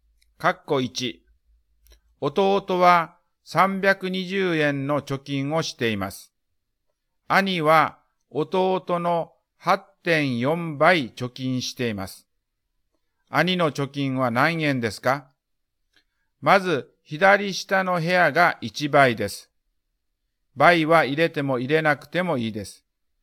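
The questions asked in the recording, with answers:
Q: 兄の貯金は何円ですか?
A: 2688円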